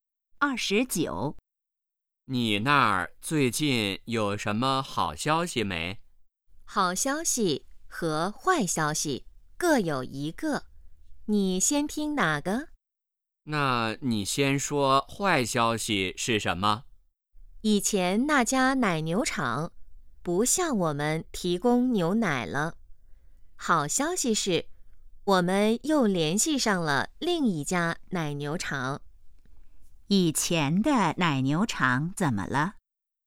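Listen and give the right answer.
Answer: 不向他们提供牛奶了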